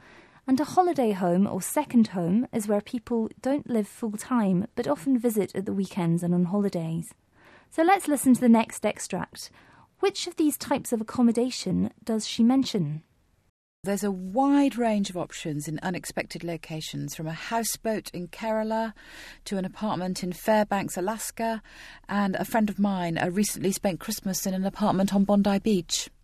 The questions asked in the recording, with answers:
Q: Which of these types of accommodation does she mention?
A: She mentioned a houseboat in Kerala, India, and an apartment in Alaska.